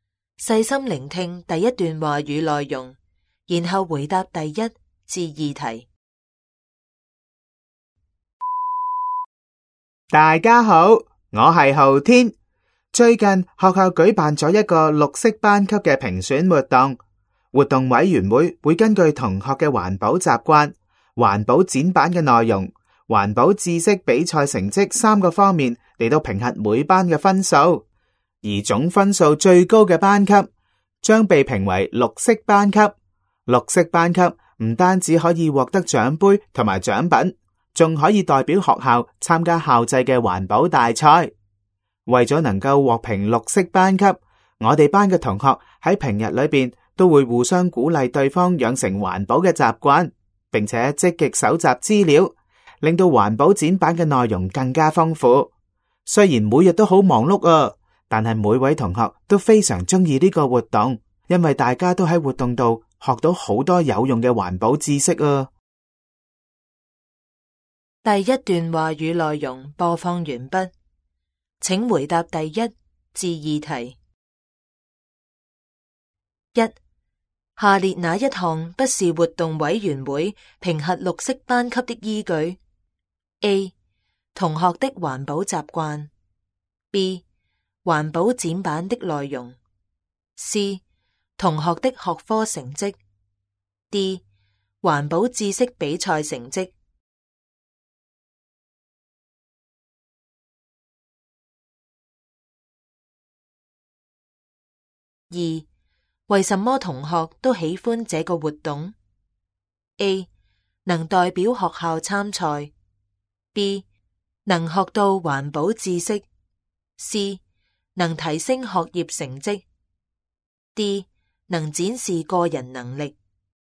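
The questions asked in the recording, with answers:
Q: 下列哪一项不是活动委员会评核绿色班级的依据 ?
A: C: 同学的学科成绩。

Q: 为什么同学都喜欢这个活动 ?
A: B: 能学到环保知识。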